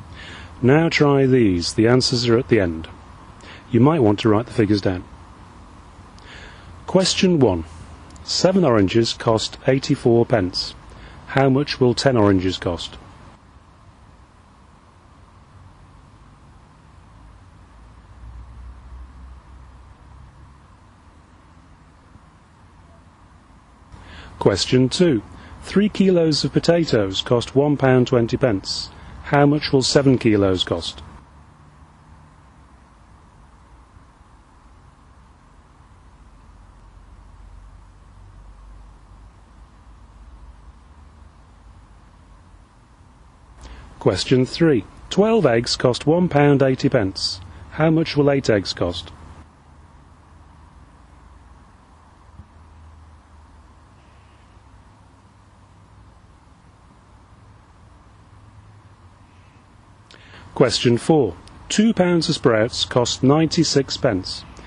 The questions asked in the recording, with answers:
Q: How much will 10 oranges cost?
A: Question 1, £1.20.

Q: How much will 7 kilos cost?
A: Question 2, £2.80.

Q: How much will 8 eggs cost?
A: Question 3, £1.20 again.